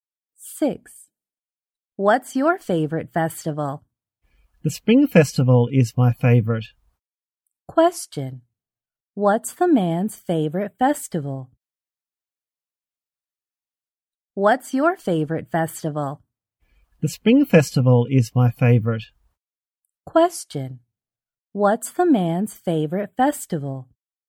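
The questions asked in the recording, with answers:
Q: What's the man's favorite festival?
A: The Spring Festival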